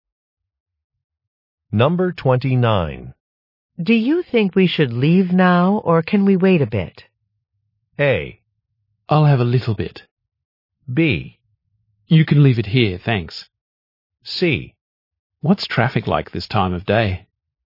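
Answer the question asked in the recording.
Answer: C: What's traffic like this time of day?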